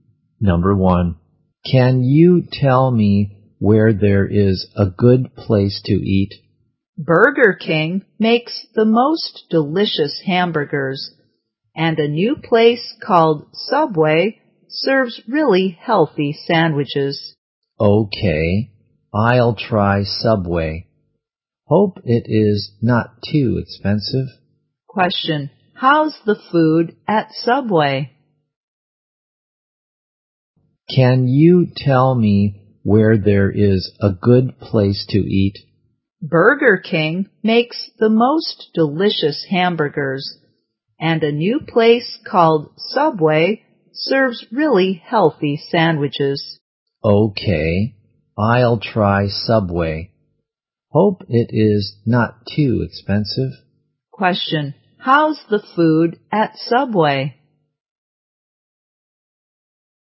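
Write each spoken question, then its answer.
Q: Question, how's the food at Subway?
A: Really healthy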